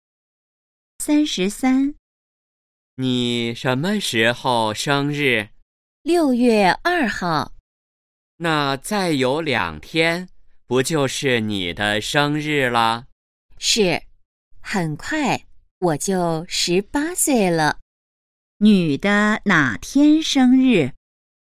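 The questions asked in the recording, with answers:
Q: 女的哪天生日?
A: 6月2号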